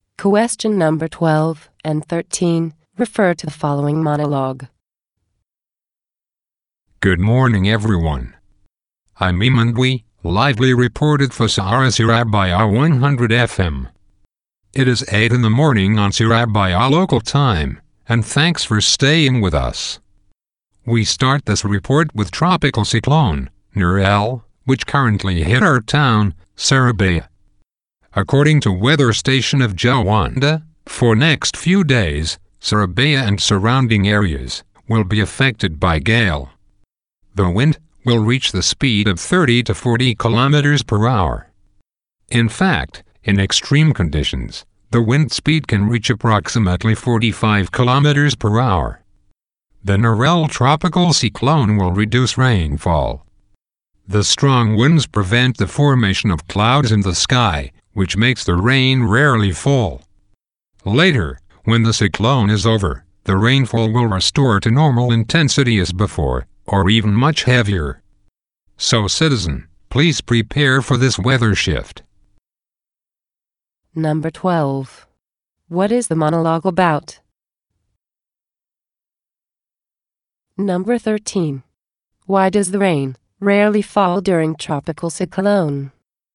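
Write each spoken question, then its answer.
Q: What is the monologue about?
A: A weather report about tropical cyclone Nurel hitting Surabaya

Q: Why does the rain rarely fall during tropical cyclone?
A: The strong winds prevent the formation of clouds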